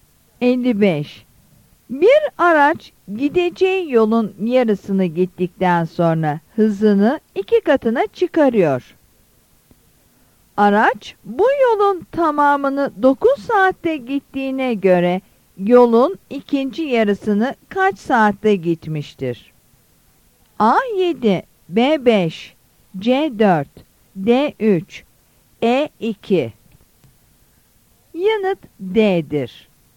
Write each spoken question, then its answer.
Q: Araç bu yolun tamamını 9 saatte gittiğine göre yolun ikinci yarısını kaç saatte gitmiştir?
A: Yanıt D'dir.